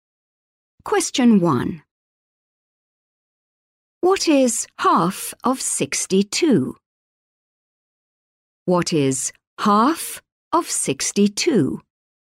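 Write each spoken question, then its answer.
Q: What is half of 62?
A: 31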